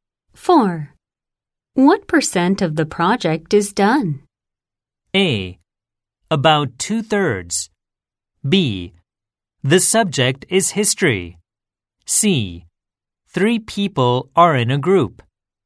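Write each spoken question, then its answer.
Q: What percent of the project is done?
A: A: About 2/3.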